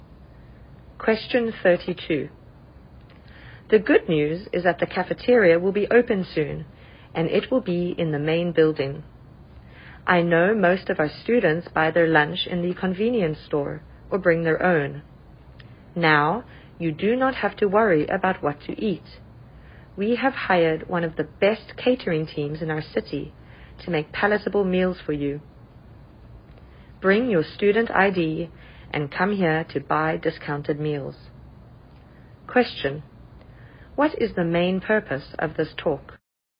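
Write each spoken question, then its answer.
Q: What is the main purpose of this talk?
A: To announce that a new cafeteria will open soon in the main building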